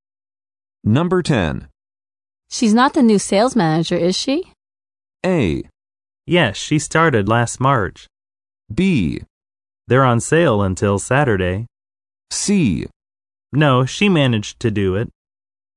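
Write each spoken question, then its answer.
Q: She's not the new sales manager, is she?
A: A: Yes, she started last March.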